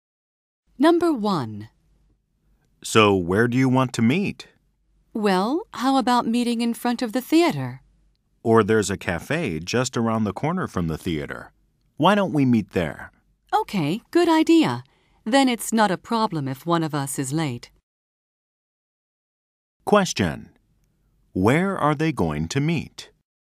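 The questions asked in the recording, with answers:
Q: Where are they going to meet?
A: At a cafe just around the corner from the theater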